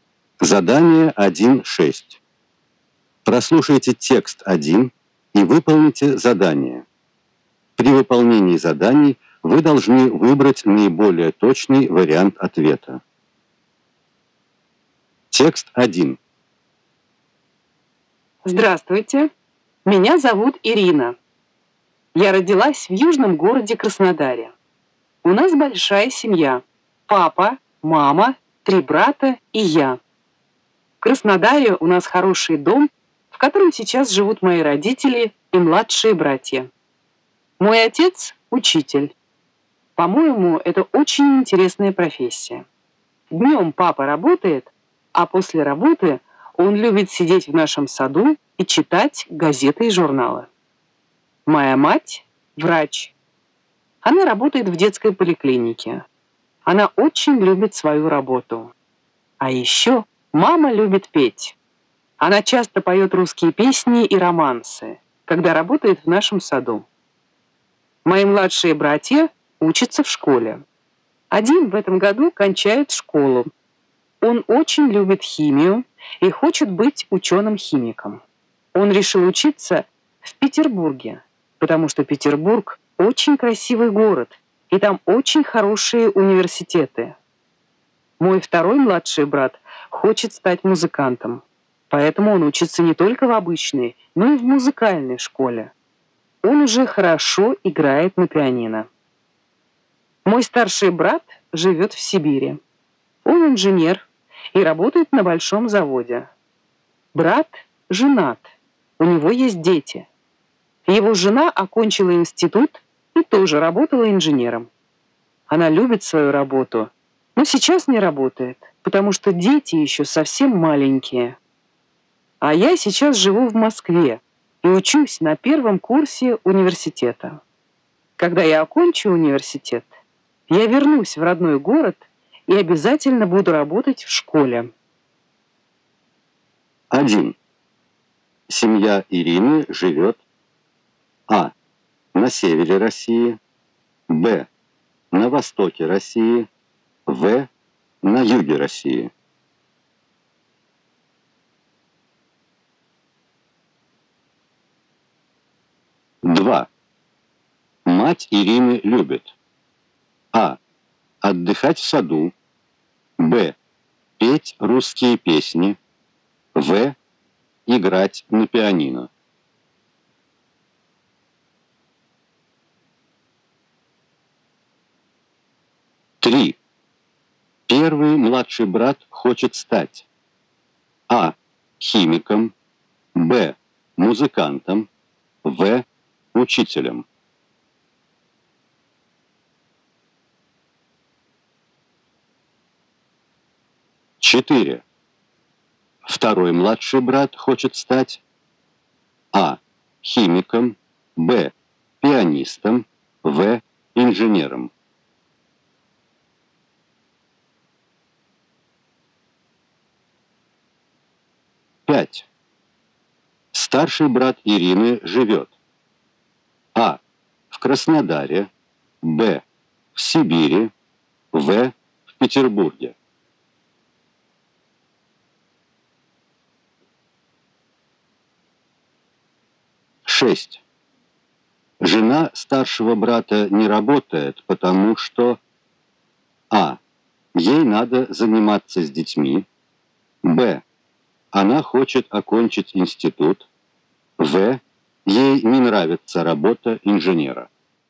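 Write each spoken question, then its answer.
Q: Семья Ирины живет А. на севере России, Б. на востоке России, В. на юге России.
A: В: на юге России

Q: Мать Ирины любит А. отдыхать в саду, Б. петь русские песни, В. играть на пианино.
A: Б: петь русские песни

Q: Первый младший брат хочет стать А. химиком, Б. музыкантом, В. учителем.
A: А: химиком

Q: Второй младший брат хочет стать А. химиком, Б. пианистом, В. инженером.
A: Б: пианистом

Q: Старший брат Ирины живет А. в Краснодаре, Б. в Сибири, В. в Петербурге.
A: Б: в Сибири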